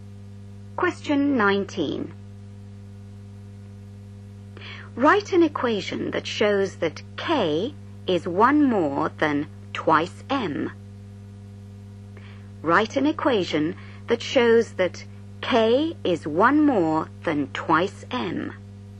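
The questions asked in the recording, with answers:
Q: Write an equation that shows that K is one more than twice M.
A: K = 2M + 1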